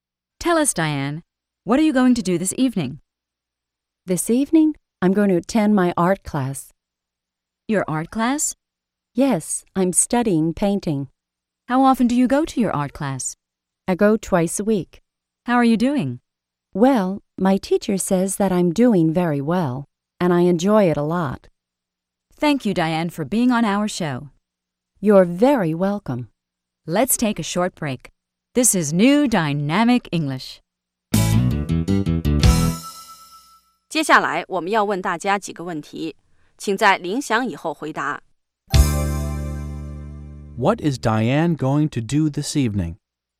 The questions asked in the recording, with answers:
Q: What is Diane going to do this evening?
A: She's going to attend her art class.